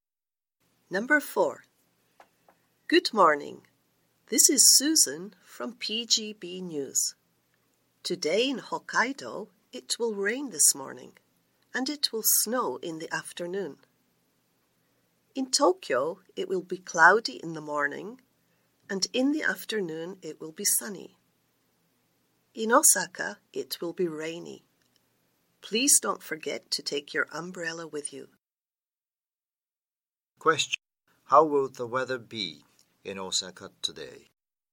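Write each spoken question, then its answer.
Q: How will the weather be in Osaka today?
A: Rainy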